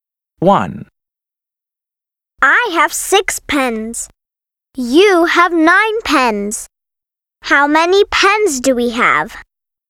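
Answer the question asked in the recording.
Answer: 15 pens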